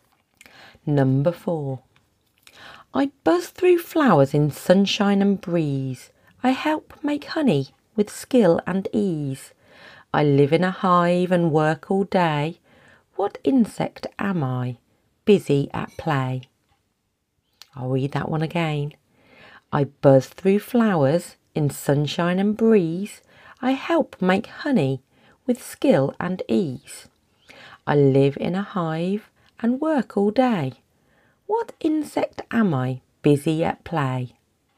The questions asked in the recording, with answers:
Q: What insect am I, busy at play?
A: That was a bee.